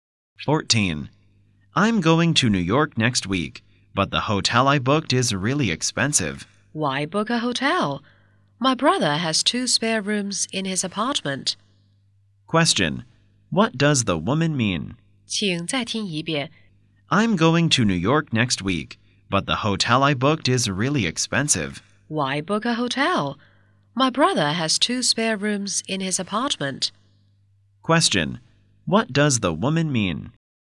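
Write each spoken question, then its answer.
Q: Question. What does the woman mean?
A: He can stay at her brother's apartment instead of a hotel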